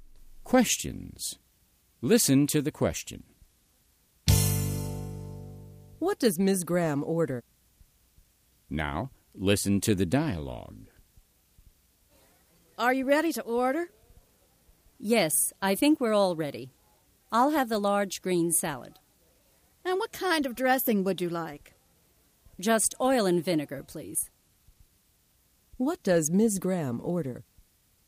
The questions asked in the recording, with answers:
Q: What does Ms. Graham order?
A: She orders a large green salad with oil and vinegar dressing.